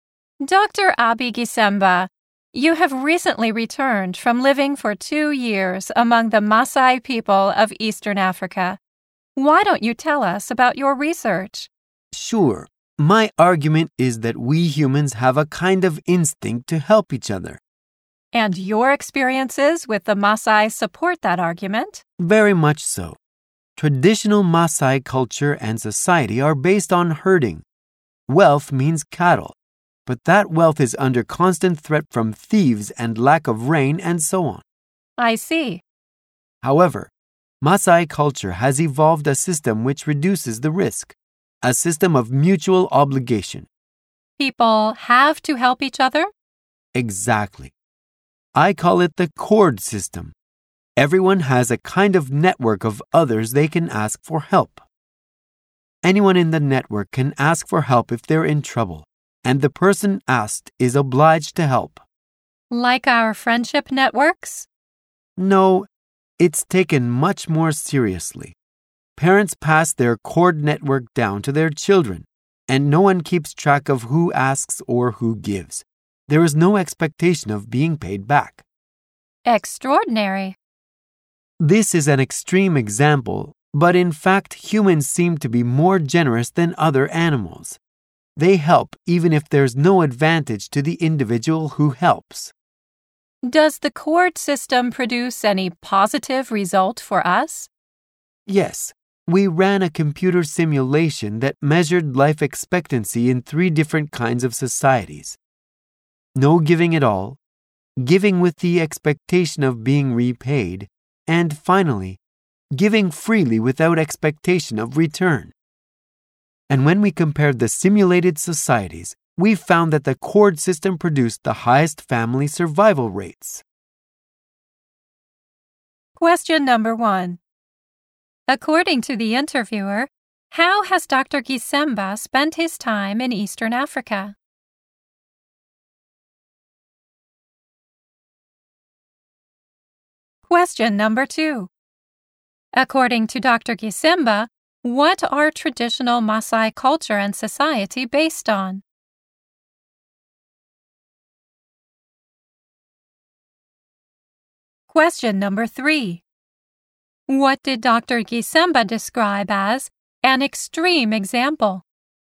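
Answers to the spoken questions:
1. He lived among the Maasai people for 2 years.
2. Herding.
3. The Maasai cord system of helping each other without expecting to be paid back.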